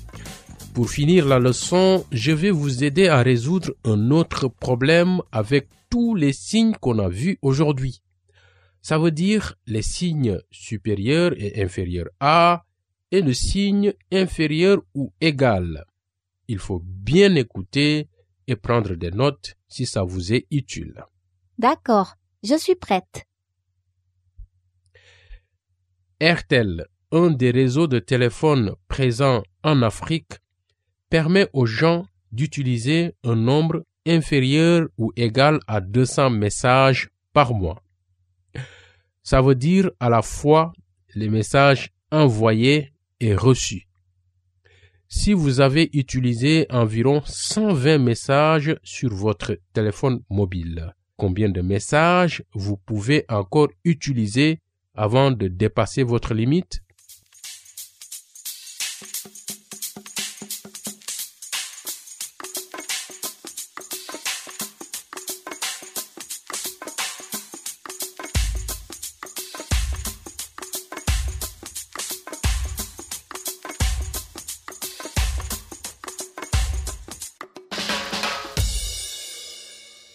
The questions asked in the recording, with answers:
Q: Combien de messages vous pouvez encore utiliser avant de dépasser votre limite?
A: Je pense que je peux encore utiliser 80 messages de plus.